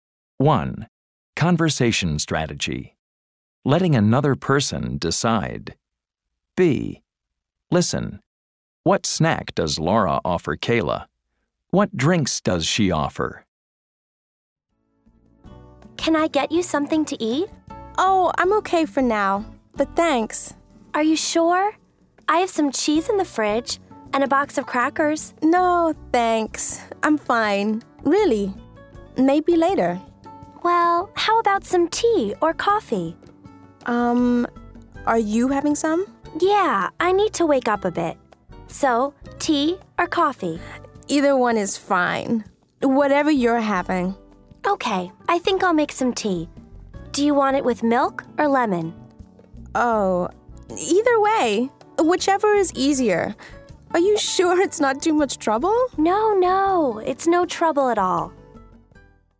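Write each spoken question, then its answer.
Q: What snack does Laura offer Kayla?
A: Cheese and crackers

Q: What drinks does she offer?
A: Tea or coffee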